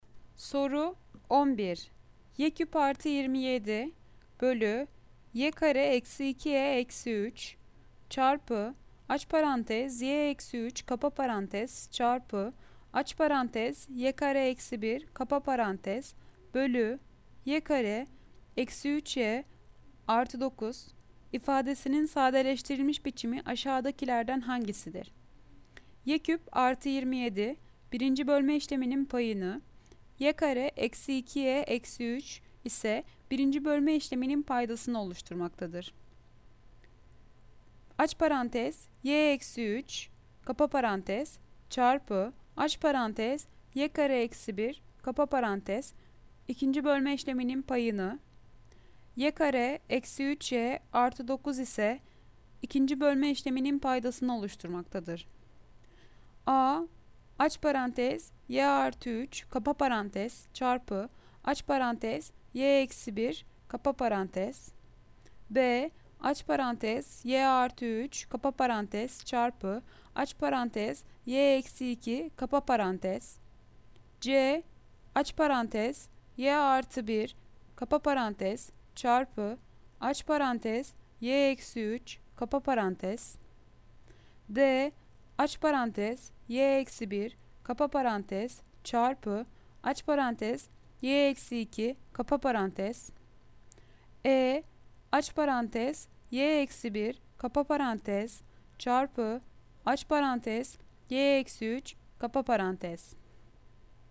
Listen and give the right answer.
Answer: Cevap Adana aç parantez y artı 3 kapa parantez çarpı aç parantez y eksi 1 kapa parantez.